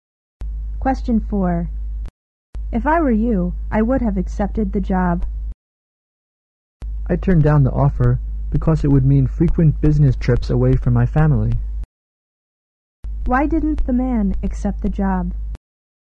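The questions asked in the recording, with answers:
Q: Why didn't the man accept the job?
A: It would mean frequent business trips away from his family.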